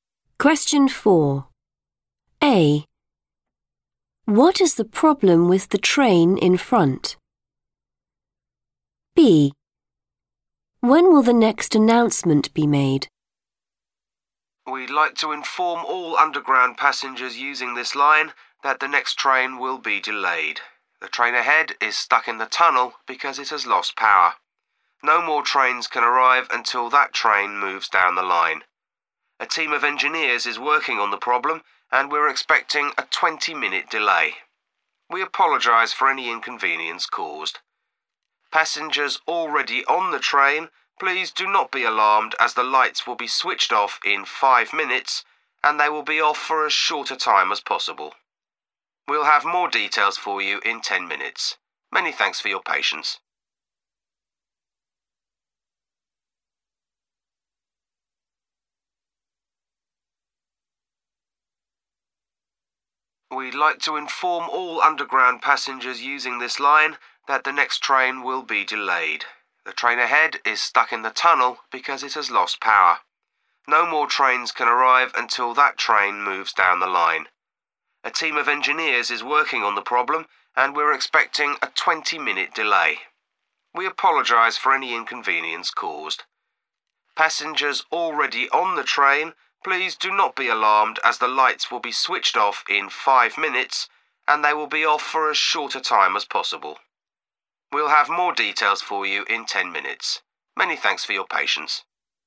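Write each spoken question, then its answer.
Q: What is the problem with the train in front?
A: it has lost power

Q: When will the next announcement be made?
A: in 10 minutes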